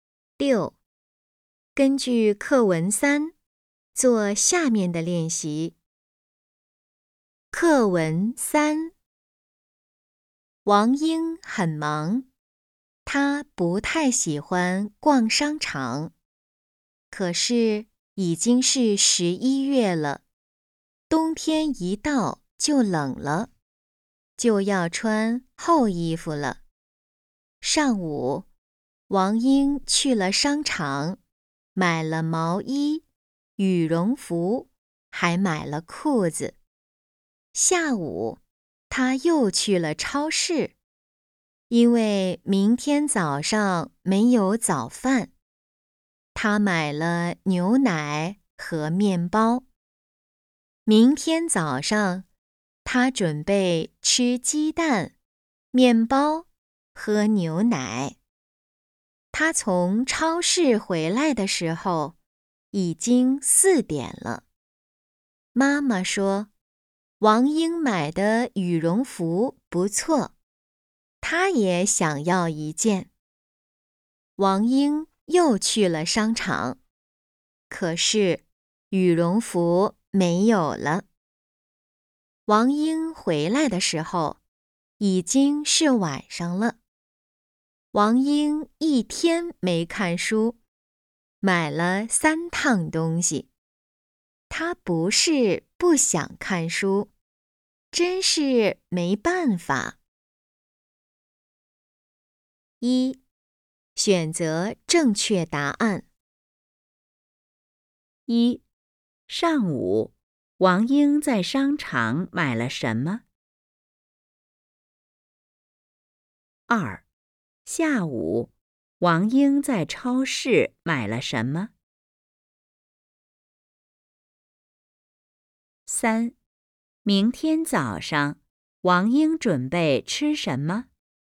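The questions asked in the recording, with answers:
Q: 上午,王英在商场买了什么?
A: 毛衣、羽绒服和裤子

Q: 下午,王英在超市买了什么?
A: 牛奶和面包

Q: 明天早上,王英准备吃什么?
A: 鸡蛋、面包,喝牛奶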